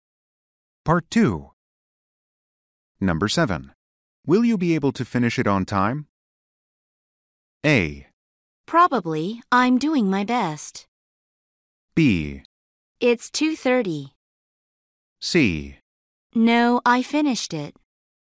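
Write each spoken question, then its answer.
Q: Will you be able to finish it on time?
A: A: Probably, I'm doing my best.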